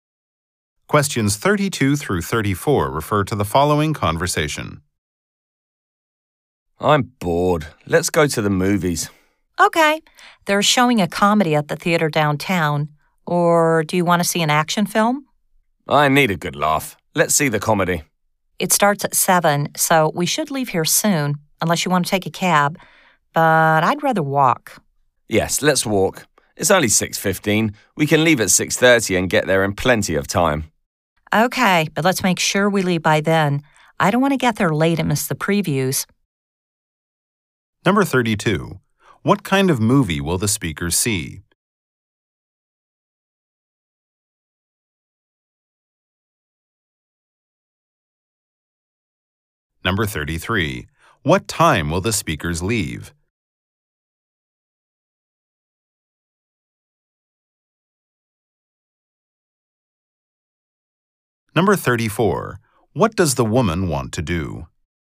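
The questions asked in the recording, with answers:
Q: What kind of movie will the speaker see?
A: A comedy

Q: What time will the speakers leave?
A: 6:30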